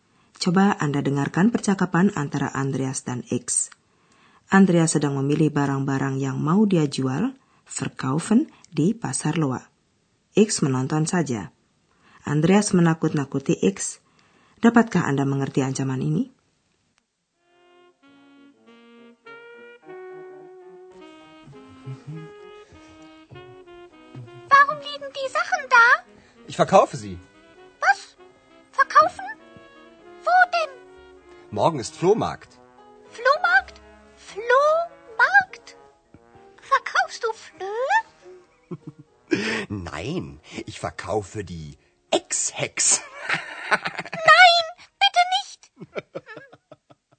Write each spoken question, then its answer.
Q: Dapatkah Anda mengerti ancaman ini?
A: Andreas mengancam X dengan mengatakan hendak menjual X.